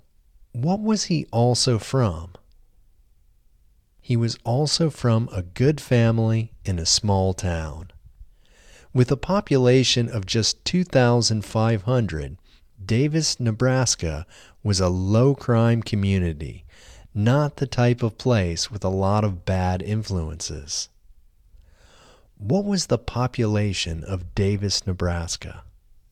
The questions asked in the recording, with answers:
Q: What was the population of Davis, Nebraska?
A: The population of Davis, Nebraska was 2,500.